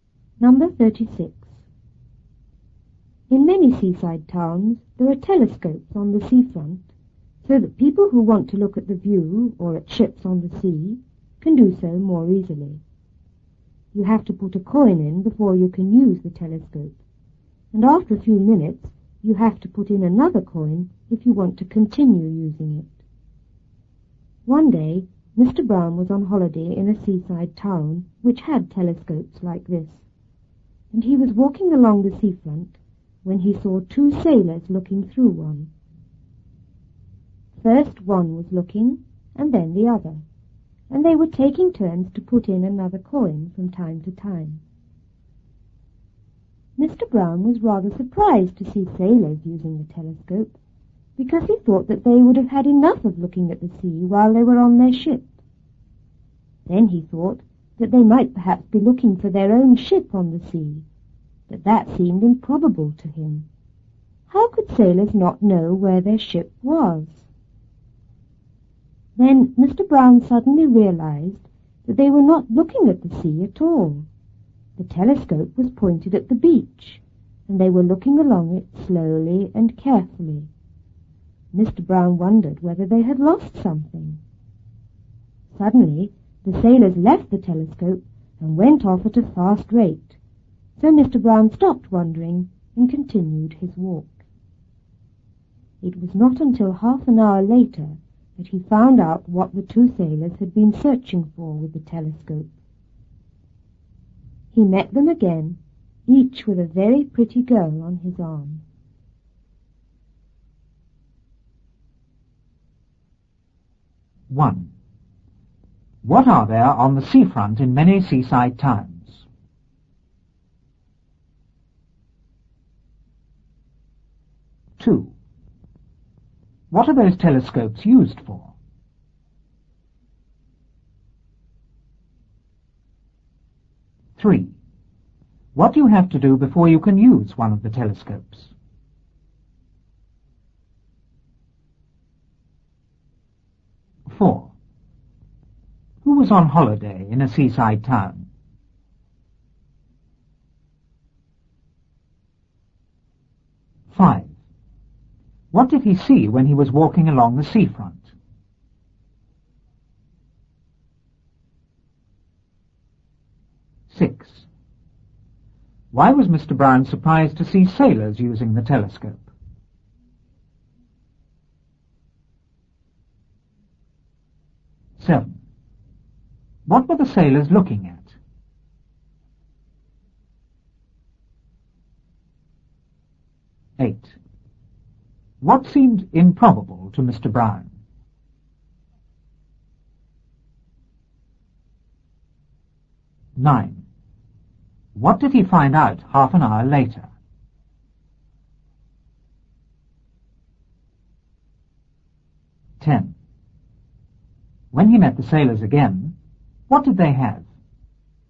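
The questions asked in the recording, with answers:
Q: What are there on the seafront in many seaside towns?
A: Telescopes

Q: What are those telescopes used for?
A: To look at the view or at ships on the sea more easily

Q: What do you have to do before you can use one of the telescopes?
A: Put a coin in

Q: Who was on holiday in a seaside town?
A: Mr. Brown

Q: What did he see when he was walking along the seafront?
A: Two sailors looking through a telescope

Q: Why was Mr. Brown surprised to see sailors using the telescope?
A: He thought they would have had enough of looking at the sea on their ship

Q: What were the sailors looking at?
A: The beach

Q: What seemed improbable to Mr.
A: That they were looking for their own ship on the sea

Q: What did he find out half an hour later?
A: What the sailors had been searching for: pretty girls

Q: When he met the sailors again, what did they have?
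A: Each had a very pretty girl on his arm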